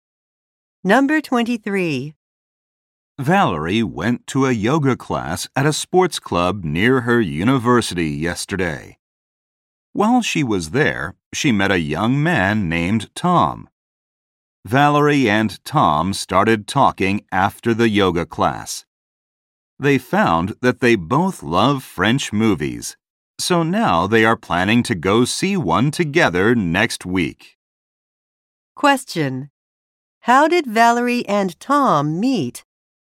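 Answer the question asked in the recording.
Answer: At a yoga class at a sports club.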